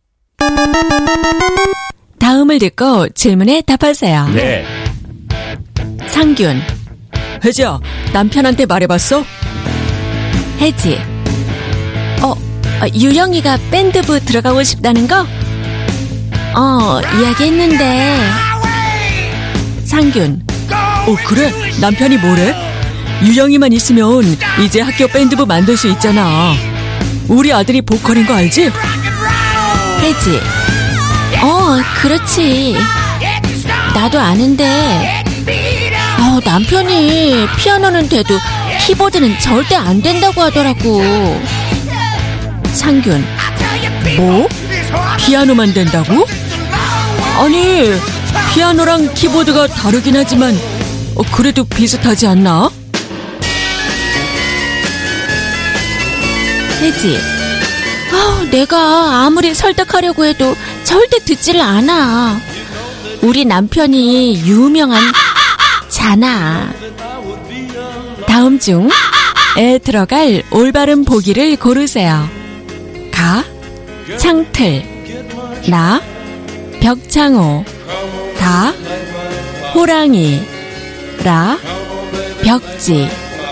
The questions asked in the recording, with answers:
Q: 다음 중에 들어갈 올바른 보기를 고르세요.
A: 벽창호.